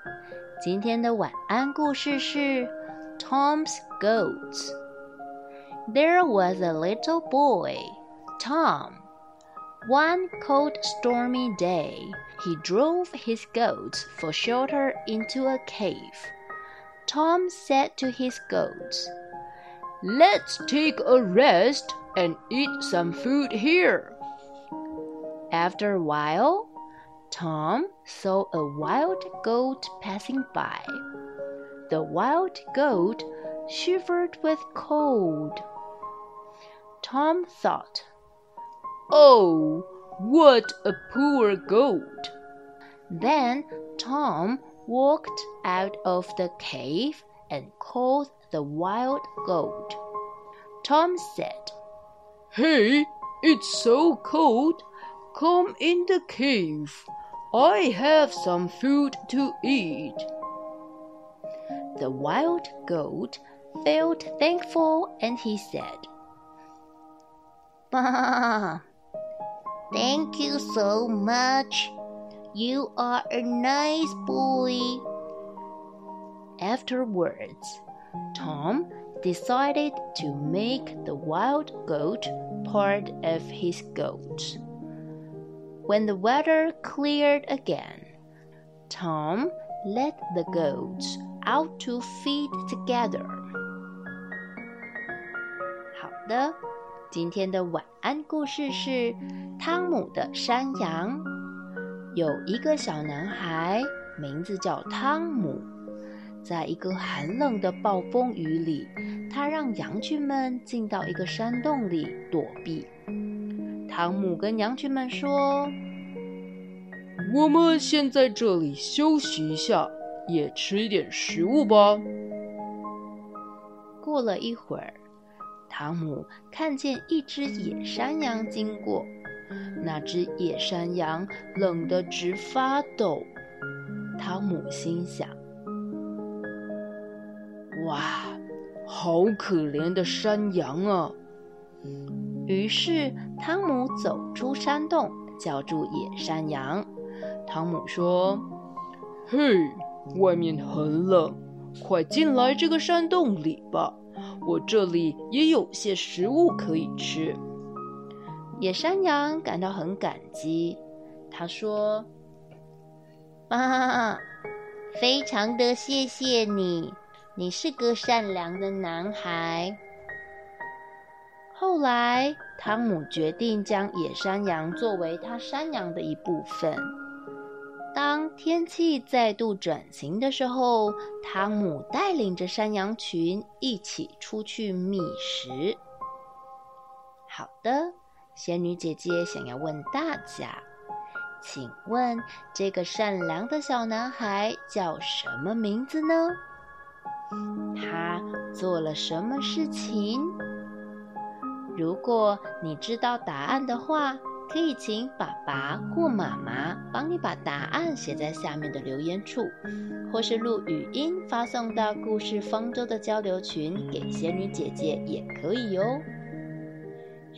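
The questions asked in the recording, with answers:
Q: 请问这个善良的小男孩叫什么名字呢?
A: 汤姆

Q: 他做了什么事情?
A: 他把冷得发抖的野山羊叫进山洞避寒,给它食物,还让它加入自己的羊群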